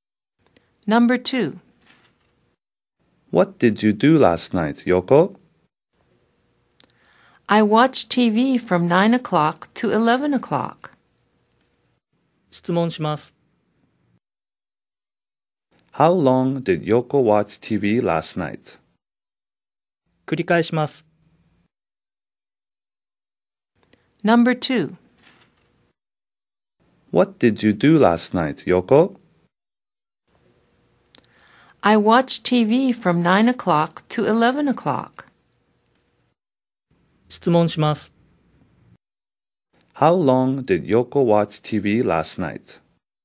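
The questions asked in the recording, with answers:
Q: How long did Yoko watch TV last night?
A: For two hours.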